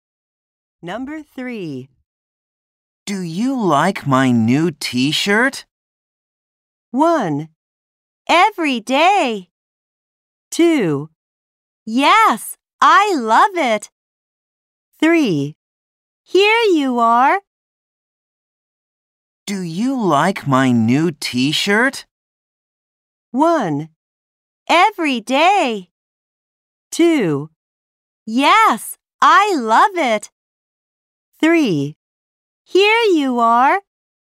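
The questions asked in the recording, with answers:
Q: Do you like my new t-shirt?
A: 2: Yes, I love it.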